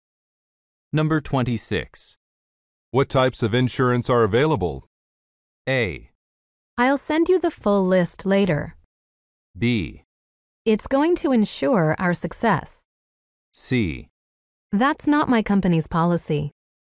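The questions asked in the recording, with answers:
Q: What types of insurance are available?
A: A: I'll send you the full list later.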